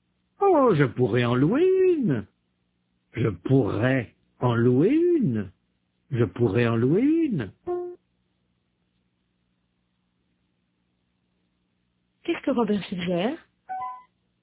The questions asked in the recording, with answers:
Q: Qu'est-ce que Robert suggère?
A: D'en louer une.